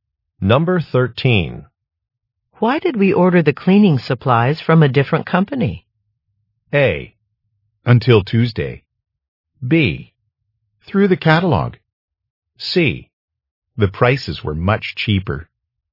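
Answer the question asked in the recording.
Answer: C: The prices were much cheaper.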